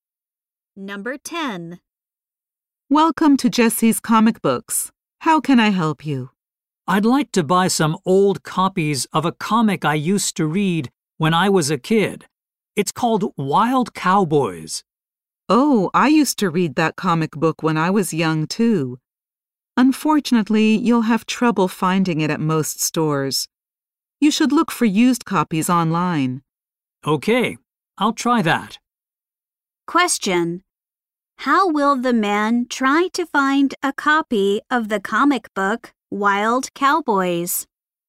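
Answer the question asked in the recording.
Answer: By looking for used copies online.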